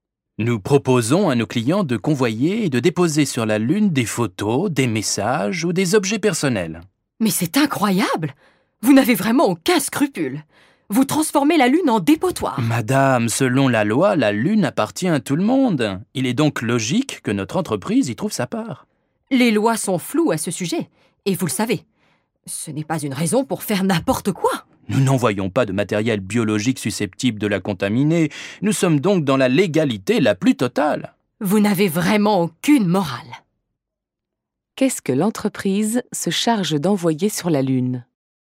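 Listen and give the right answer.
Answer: Des photos, des messages ou des objets personnels de ses clients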